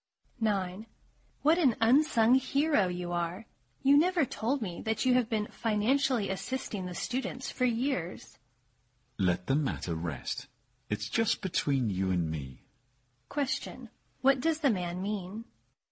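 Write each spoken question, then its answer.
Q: What does the man mean?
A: He wants to keep his help a secret.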